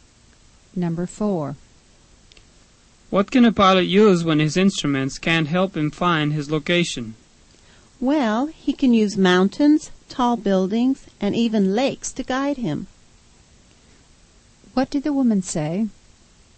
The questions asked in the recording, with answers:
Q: What did the woman say?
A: A pilot can use landmarks.